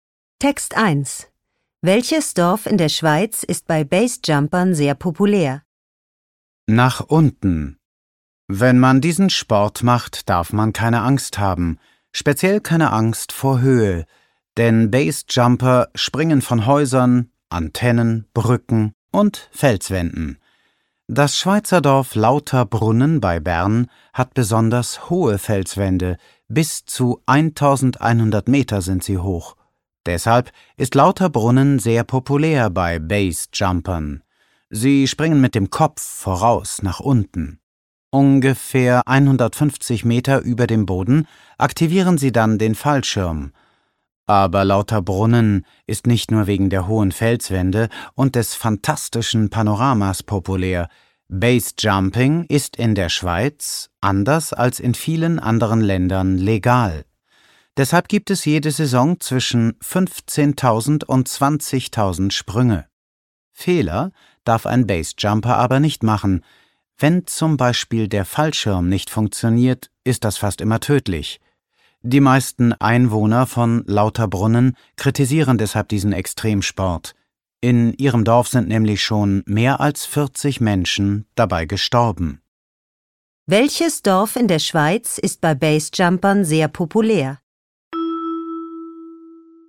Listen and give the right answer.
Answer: Lauterbrunnen ist wegen der hohen Felswände bei Basejumpern sehr populär.